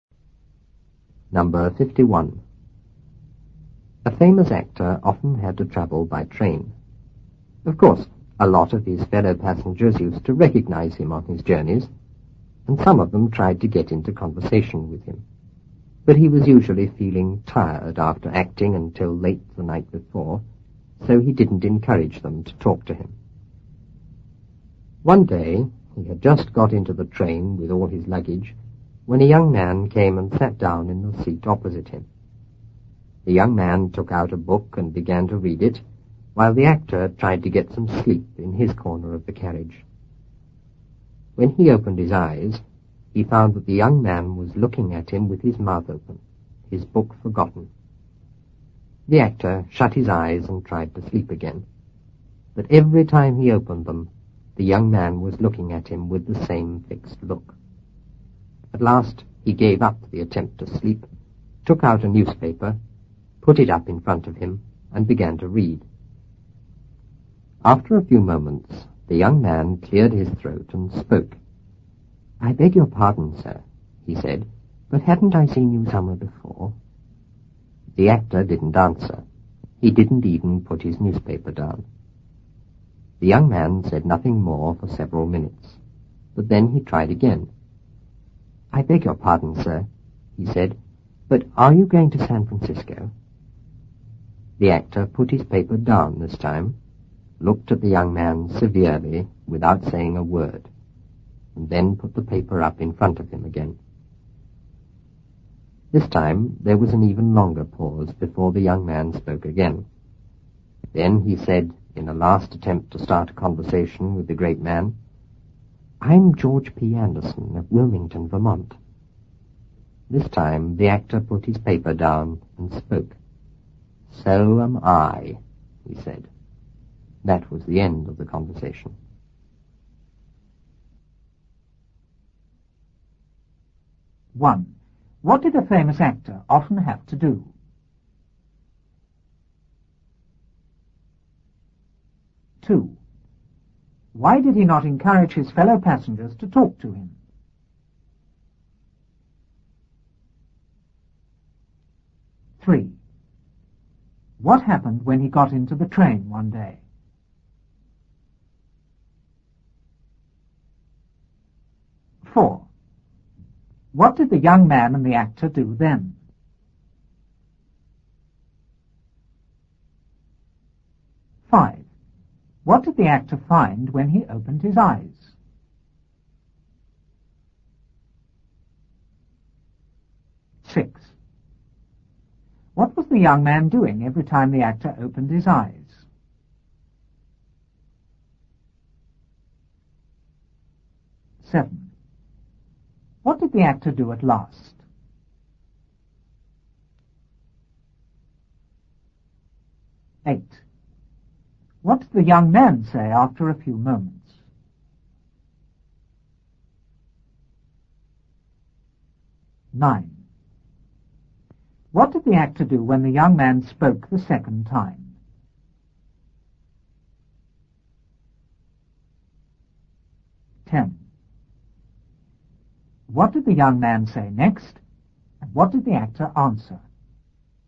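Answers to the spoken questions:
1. Travel by train.
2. He was usually tired after acting until late the night before.
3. A young man came and sat down in the seat opposite him.
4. The young man read a book; the actor tried to sleep.
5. The young man was looking at him with his mouth open, his book forgotten.
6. Looking at him with the same fixed look.
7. He gave up trying to sleep, took out a newspaper, put it up in front of him and read.
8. "I beg your pardon, sir, but haven't I seen you somewhere before?"
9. He put his paper down, looked at him severely without a word, and put the paper up again.
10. "I'm George P. Anderson of Wilmington, Vermont." The actor said, "So am I."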